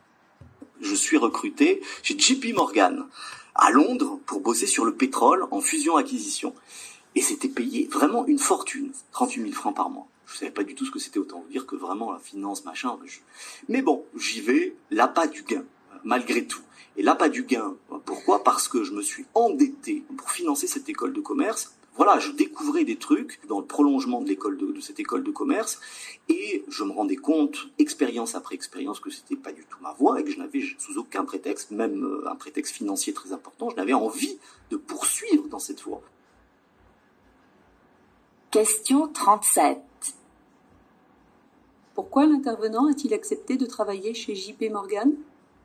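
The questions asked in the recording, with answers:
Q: Pourquoi l'intervenant a-t-il accepté de travailler chez JP Morgan ?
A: Pour l'argent : il s'était endetté pour financer son école de commerce.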